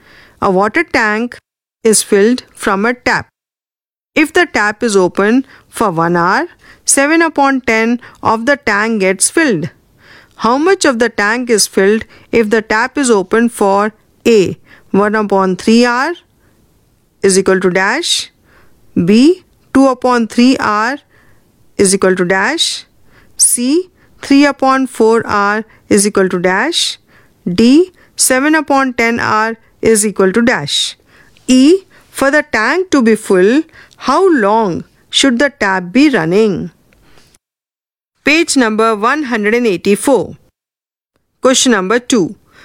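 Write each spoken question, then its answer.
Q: How much of the tank is filled if the tap is open for A, 1 upon 3 hour is equal to dash,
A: 7/30 of the tank

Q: B, 2 upon 3 hour is equal to dash,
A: 7/15 of the tank

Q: C, 3 upon 4 hour is equal to dash,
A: 21/40 of the tank

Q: D, 7 upon 10 hour is equal to dash.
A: 49/100 of the tank

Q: E, for the tank to be full, how long should the tap be running?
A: 10/7 hours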